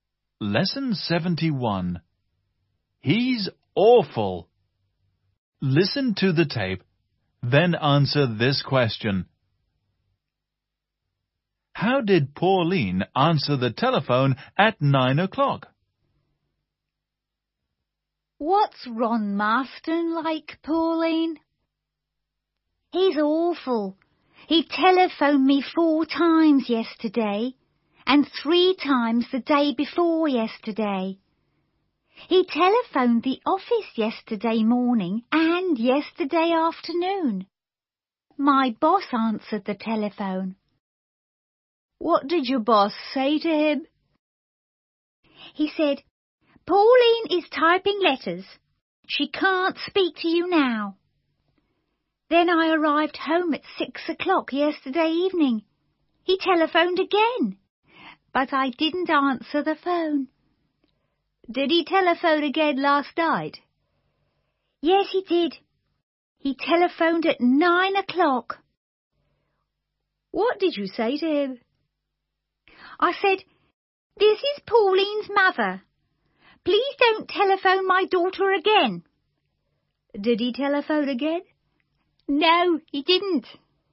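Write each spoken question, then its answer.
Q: How did Pauline answer the telephone at 9 o'clock?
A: She said, "This is Pauline's mother. Please don't telephone my daughter again."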